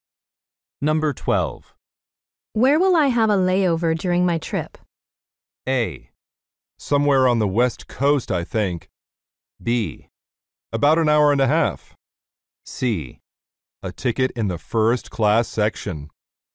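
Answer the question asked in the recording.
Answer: A: Somewhere on the West Coast, I think.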